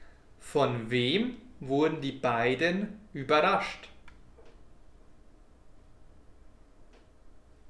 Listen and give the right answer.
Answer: Vom Schnee. Sie wurden vom Schnee überrascht.